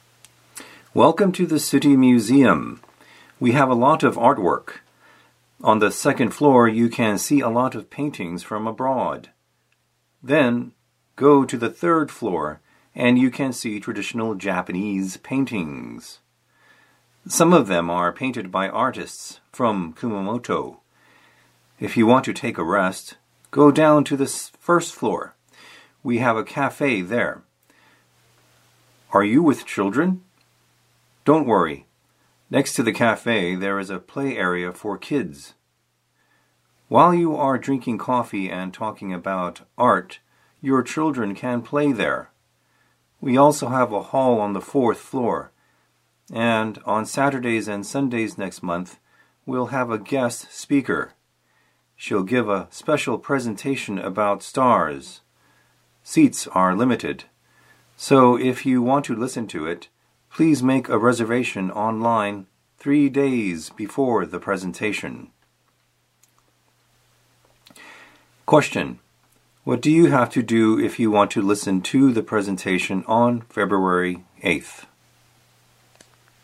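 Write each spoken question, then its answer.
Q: what do you have to do if you want to listen to the presentation on February 8th?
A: Make a reservation online 3 days before (by February 5th)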